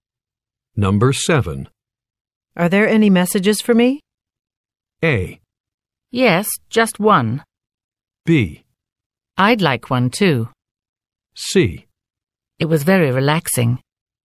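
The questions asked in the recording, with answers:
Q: Are there any messages for me?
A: A: Yes, just one.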